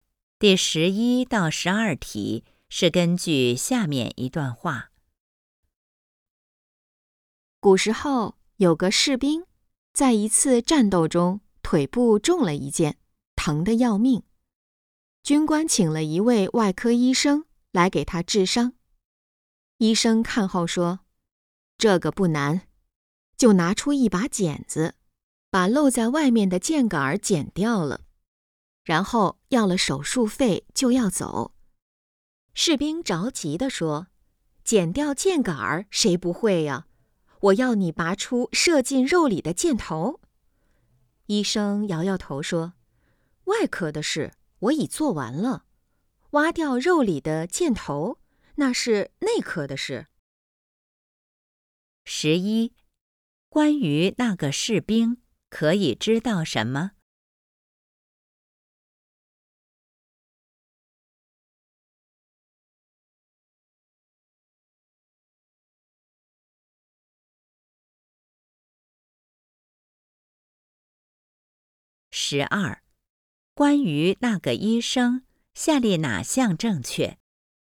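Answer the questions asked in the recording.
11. 腿部中了一箭
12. 只剪掉了箭杆,没有取出箭头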